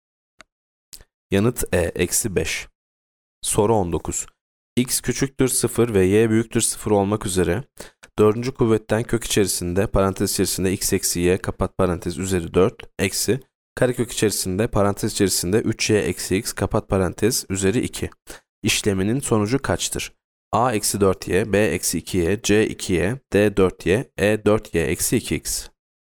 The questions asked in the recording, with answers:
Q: X küçüktür 0 ve Y büyüktür 0 olmak üzere dördüncü kuvvetten kök içerisinde parantez içerisinde x eksi y kapat parantez üzeri 4 eksi karekök içerisinde parantez içerisinde 3y eksi x kapat parantez üzeri 2 işleminin sonucu kaçtır?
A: Yanıt B eksi 2y.